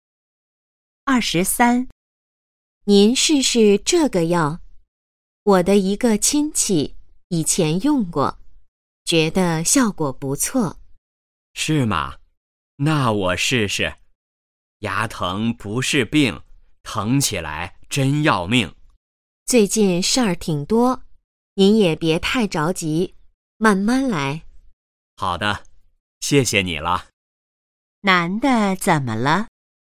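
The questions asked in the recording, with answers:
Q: 男的怎么了?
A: 牙疼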